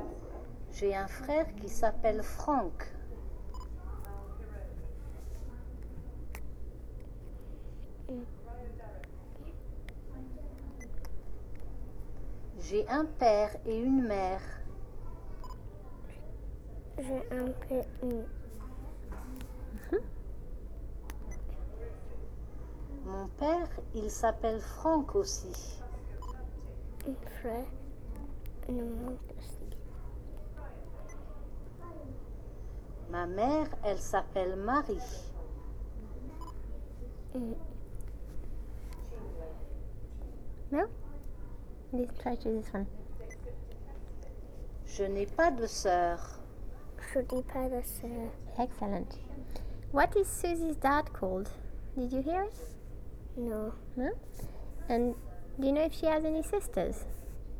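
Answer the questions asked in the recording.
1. Franck
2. No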